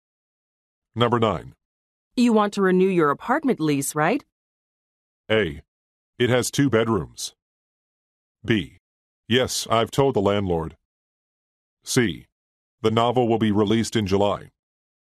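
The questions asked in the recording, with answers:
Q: You want to renew your apartment lease, right?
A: B: Yes, I've told the landlord.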